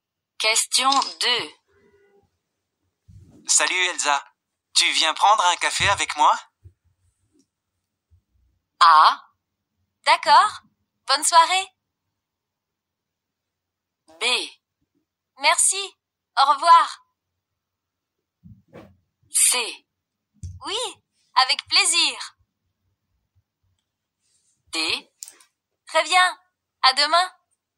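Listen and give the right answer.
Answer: C: Oui, avec plaisir.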